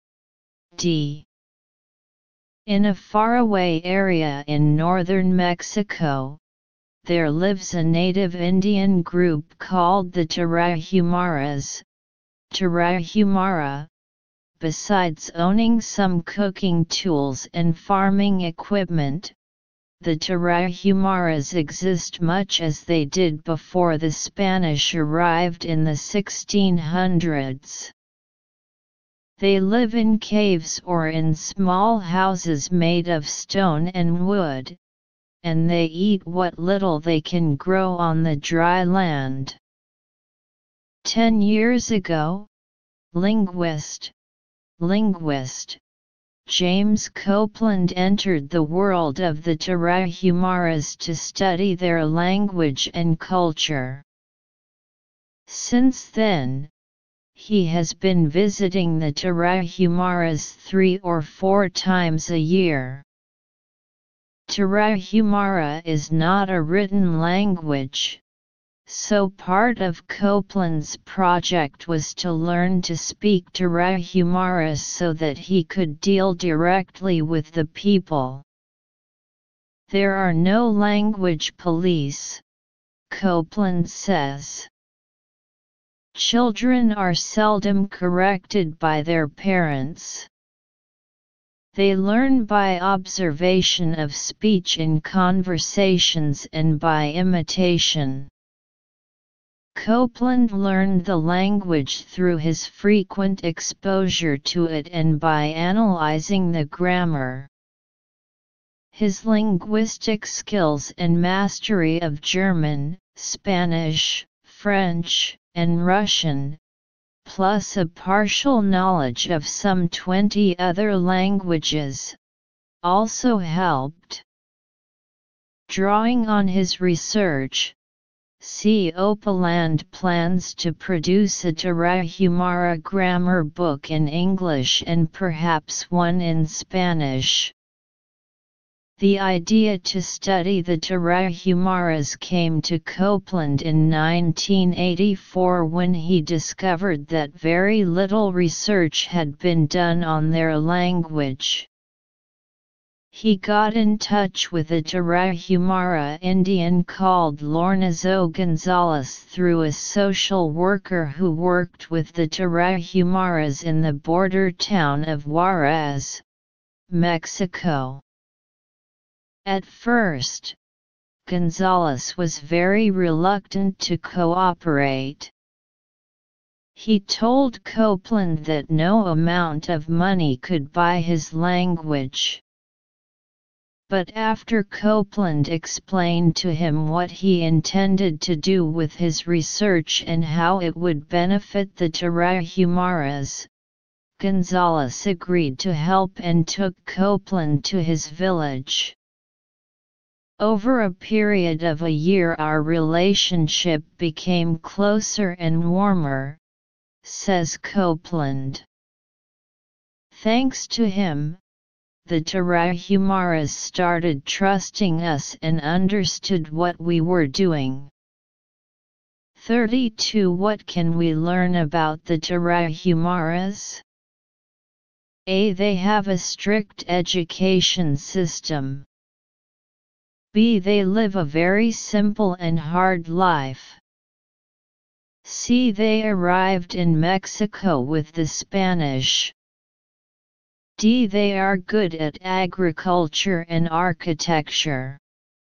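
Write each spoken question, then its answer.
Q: What can we learn about the Tarahumaras?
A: B: They live a very simple and hard life.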